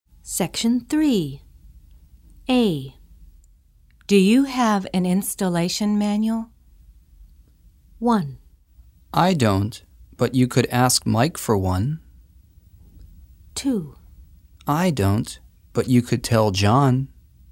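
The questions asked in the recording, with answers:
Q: Do you have an installation manual?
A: 1: I don't, but you could ask Mike for one.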